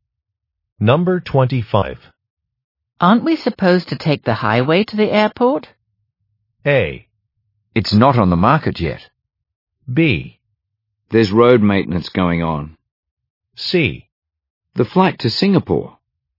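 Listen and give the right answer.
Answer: B: There's road maintenance going on.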